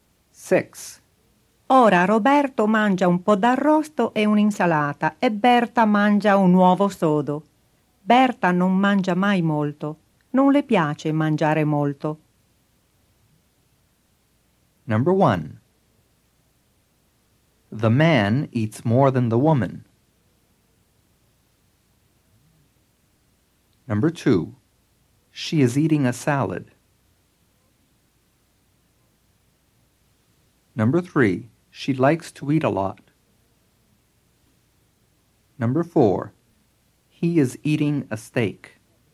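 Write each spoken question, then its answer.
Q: The man eats more than the woman.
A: True

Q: She is eating a salad.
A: False

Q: She likes to eat a lot.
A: False

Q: He is eating a steak.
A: False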